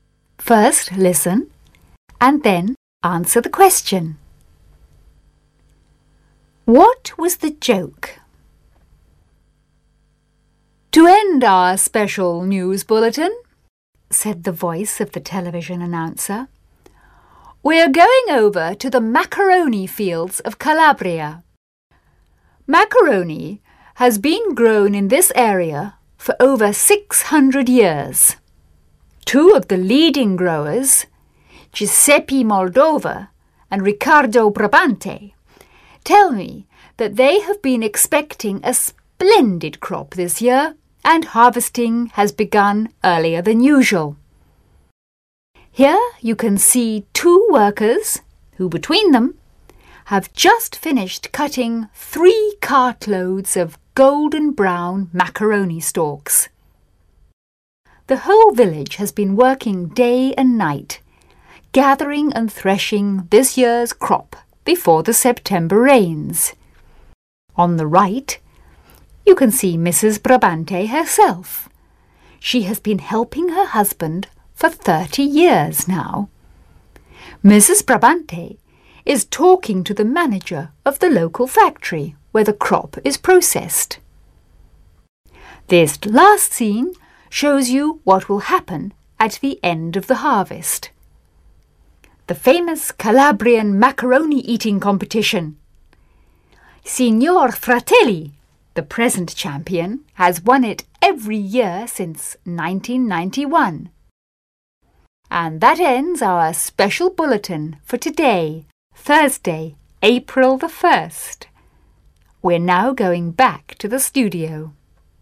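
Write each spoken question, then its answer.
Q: What was the joke?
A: The bulletin pretended macaroni grows as a crop in fields and is harvested, as an April Fool's joke.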